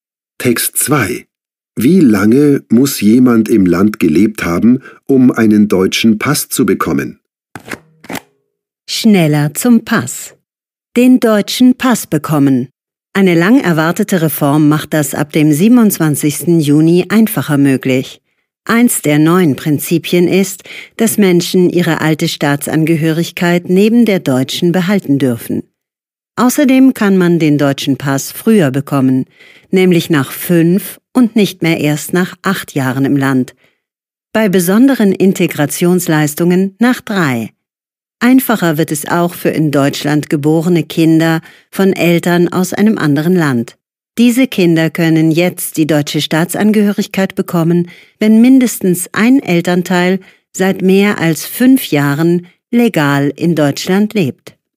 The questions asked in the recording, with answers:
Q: Wie lange muss jemand im Land gelebt haben, um einen deutschen Pass zu bekommen?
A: 5 Jahre und bei besonderen Integrationsleistungen nur 3.